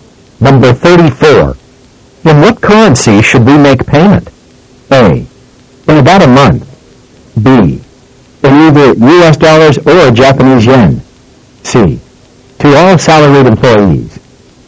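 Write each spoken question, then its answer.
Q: In what currency should we make payment?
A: B: In either US dollars or Japanese yen.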